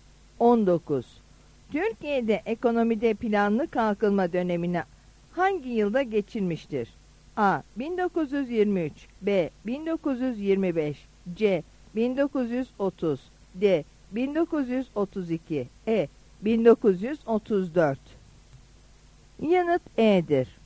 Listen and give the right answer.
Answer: Yanıt E'dir.